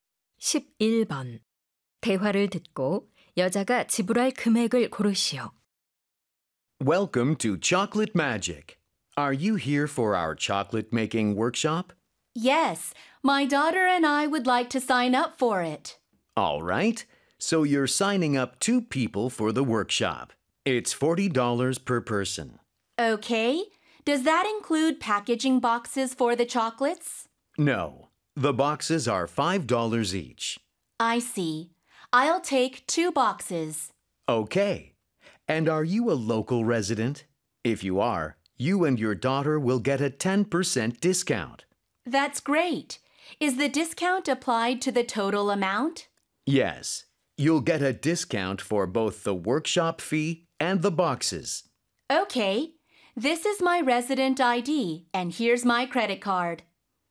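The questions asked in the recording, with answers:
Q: 대화를 듣고 여자가 지불할 금액을 고르시오.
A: $81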